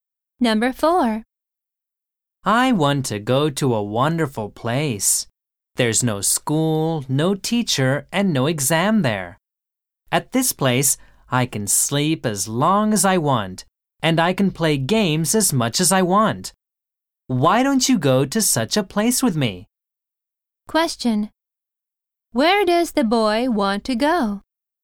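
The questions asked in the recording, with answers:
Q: Where does the boy want to go?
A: To a place with no school, no teacher and no exams.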